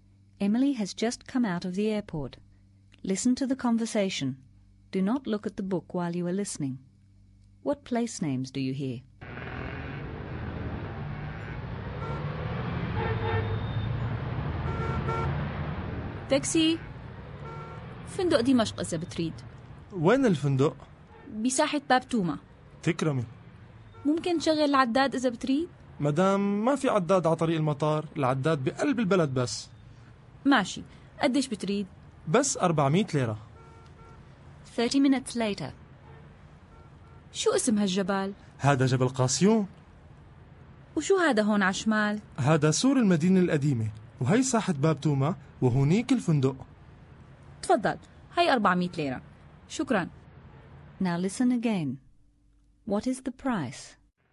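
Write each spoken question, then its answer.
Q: What place names do you hear?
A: Damascus Hotel, Bab Touma Square, the airport, Mount Qasioun, the Old City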